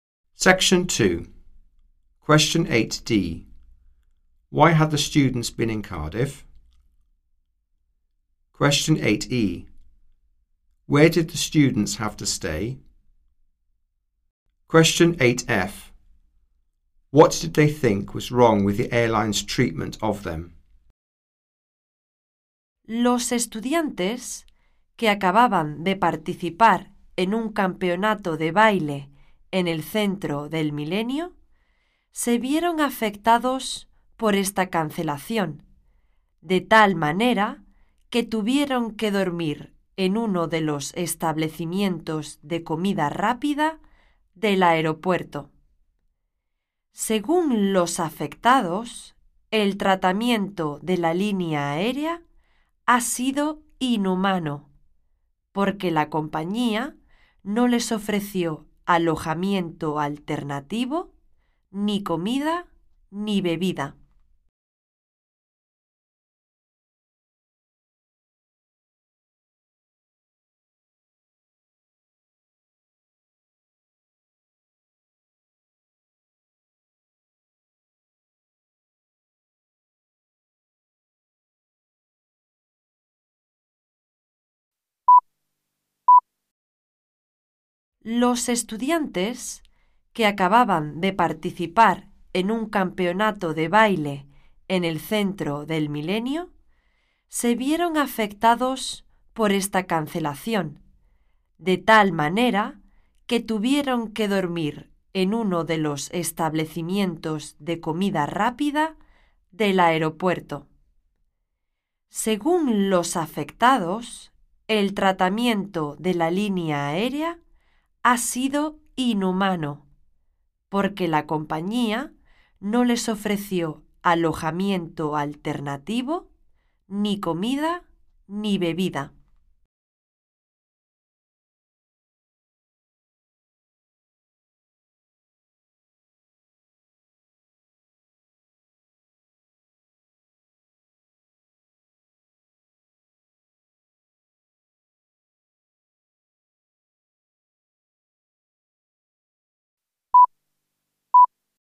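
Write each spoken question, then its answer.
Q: Why had the students been in Cardiff?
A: They had taken part in a dance championship at the Millennium Centre

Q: Where did the students have to stay?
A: In one of the airport's fast-food restaurants

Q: What did they think was wrong with the airline's treatment of them?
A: It was inhumane: no alternative accommodation, food or drink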